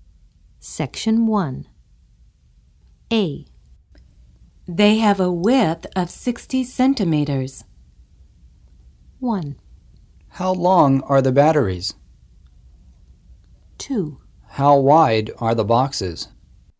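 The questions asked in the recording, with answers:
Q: They have a width of 60 centimeters.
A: 2: How wide are the boxes?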